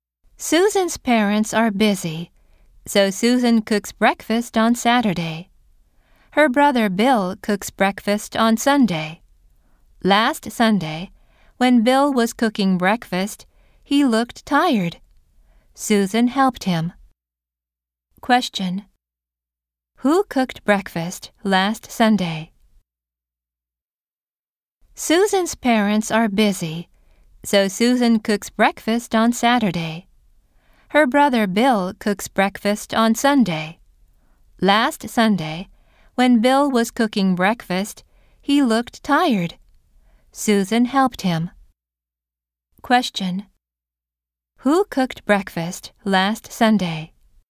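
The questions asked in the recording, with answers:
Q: Who cooked breakfast last Sunday?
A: Bill and Susan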